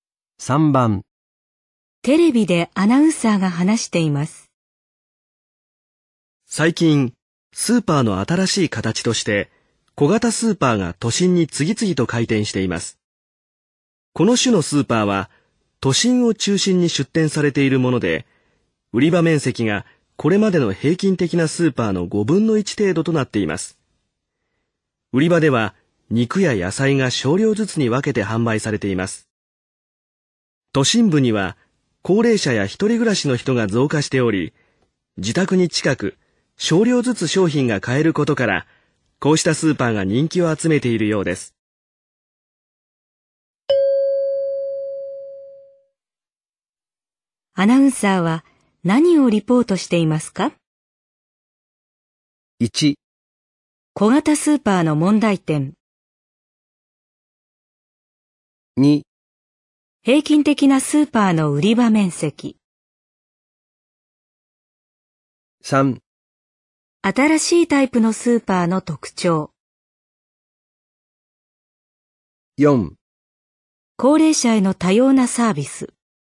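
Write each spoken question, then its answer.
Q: アナウンサーは何をリポートしていますか?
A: 3: 新しいタイプのスーパーの特徴。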